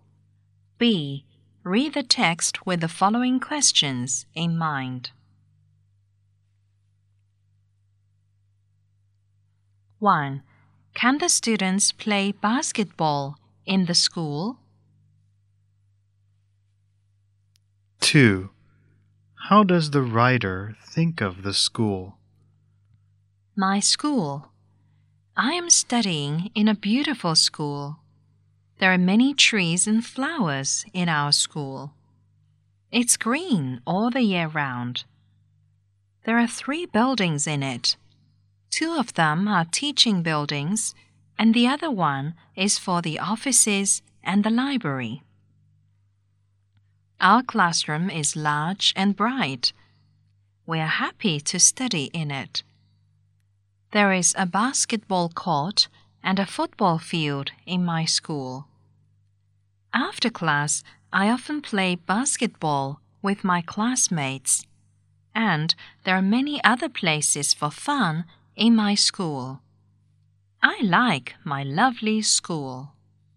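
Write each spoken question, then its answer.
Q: Can the students play basketball in the school?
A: Yes, there is a basketball court.

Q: How does the writer think of the school?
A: The writer likes the lovely, beautiful school.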